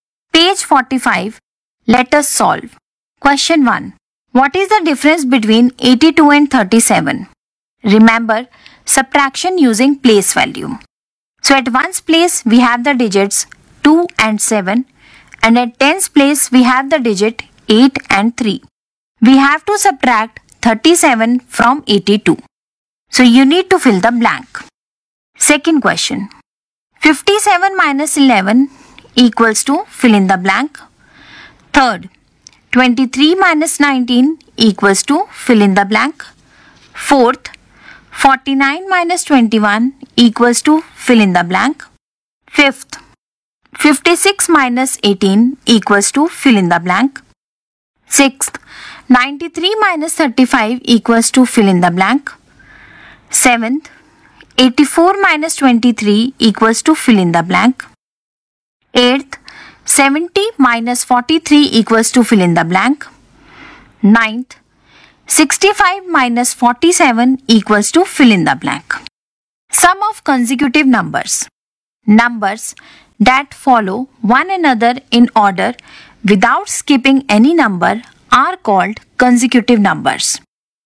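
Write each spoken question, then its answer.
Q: What is the difference between 82 and 37?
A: 45

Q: 57 minus 11 equals to fill in the blank.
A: 46

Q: 49 minus 21 equals to fill in the blank.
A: 28

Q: 56 minus 18 equals to fill in the blank.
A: 38

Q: 93 minus 35 equals to fill in the blank.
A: 58

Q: 84 minus 23 equals to fill in the blank.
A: 61

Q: 70 minus 43 equals to fill in the blank.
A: 27

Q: 65 minus 47 equals to fill in the blank.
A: 18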